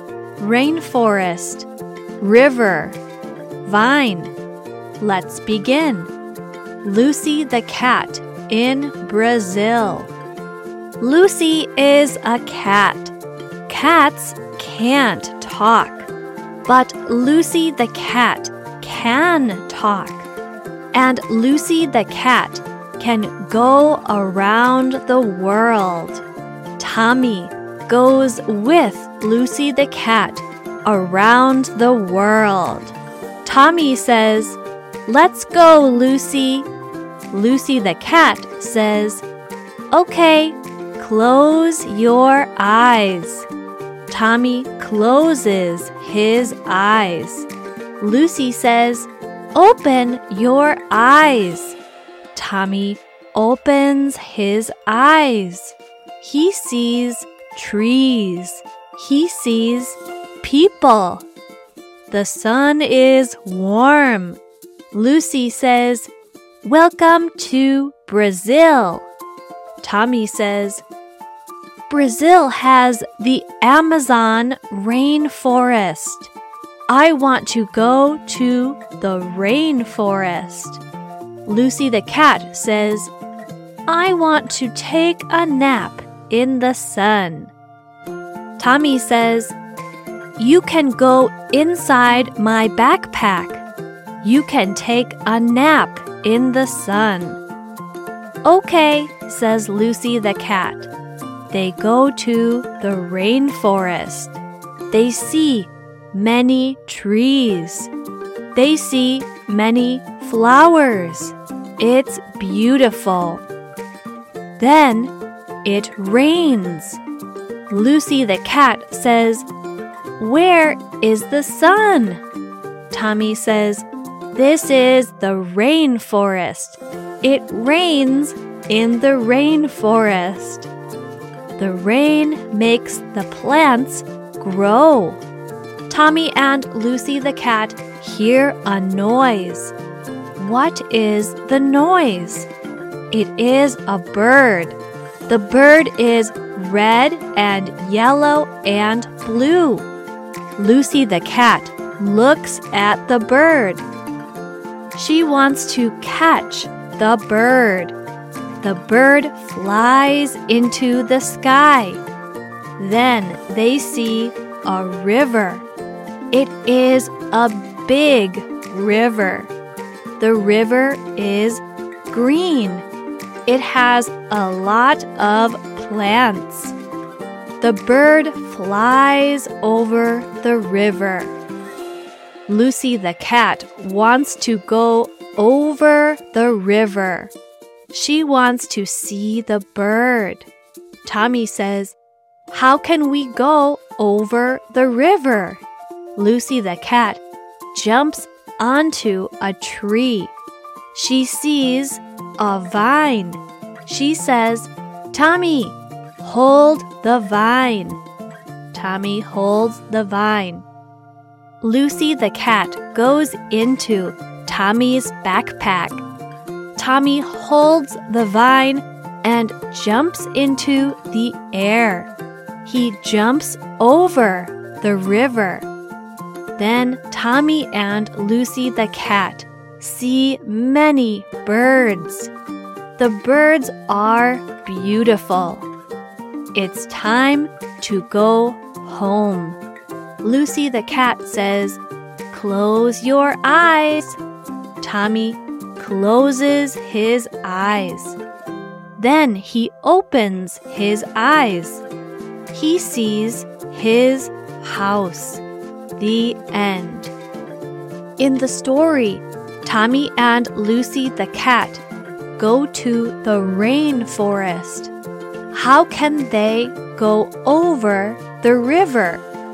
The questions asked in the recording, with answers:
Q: How can they go over the river?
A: Tommy holds the vine and jumps over the river.